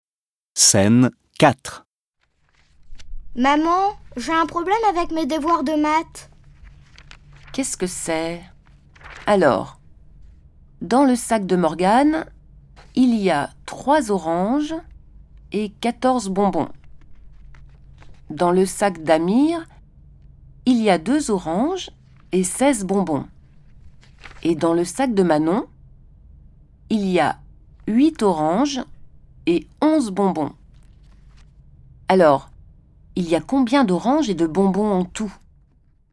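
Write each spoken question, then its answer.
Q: Alors, il y a combien d'oranges et de bonbons en tout ?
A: 13 oranges et 41 bonbons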